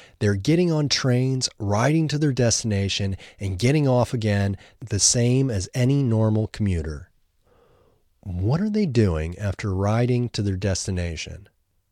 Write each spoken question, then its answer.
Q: What are they doing after riding to their destination?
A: After riding to their destination, they are getting off again.